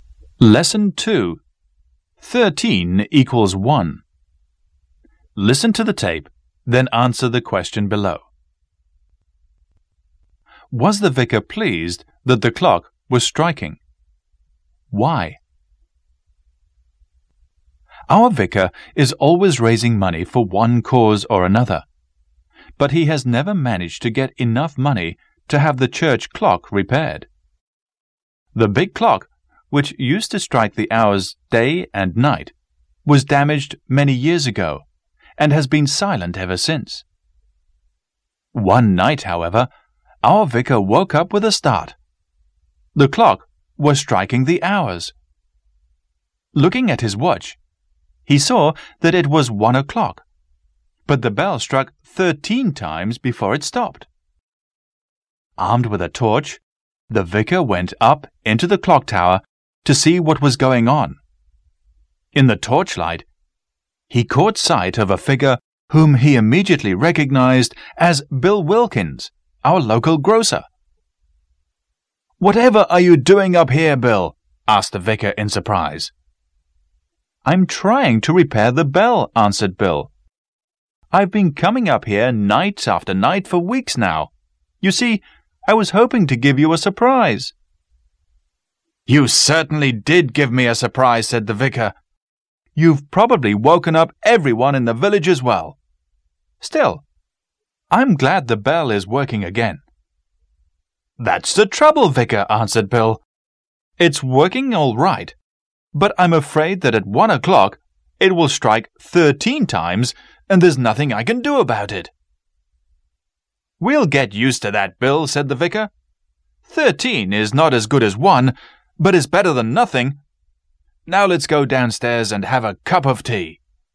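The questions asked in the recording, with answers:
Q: Was the vicar pleased that the clock was striking?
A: Yes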